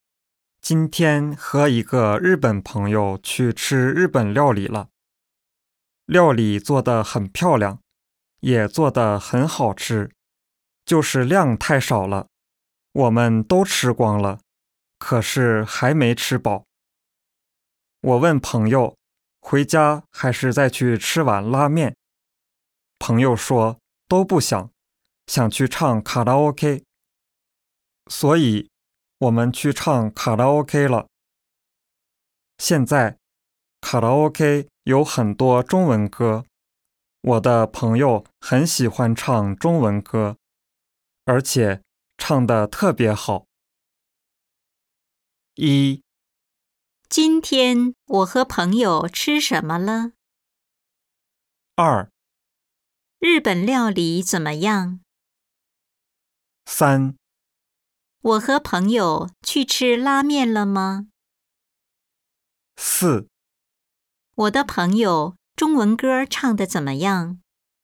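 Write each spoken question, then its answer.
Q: 今天我和朋友吃什么了?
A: 日本料理

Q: 日本料理怎么样?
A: 做得很漂亮,也很好吃,就是量太少了

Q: 我和朋友去吃拉面了吗?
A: 没有,去唱卡拉OK了

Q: 我的朋友中文歌唱得怎么样?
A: 唱得特别好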